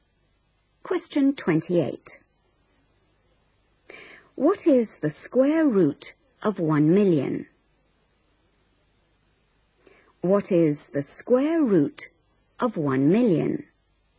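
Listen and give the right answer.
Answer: 1000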